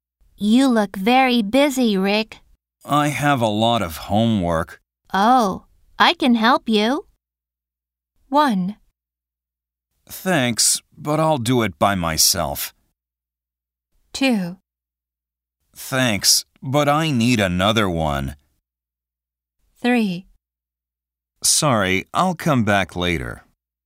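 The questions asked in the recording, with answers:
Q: Oh, I can help you.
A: 1: Thanks, but I'll do it by myself.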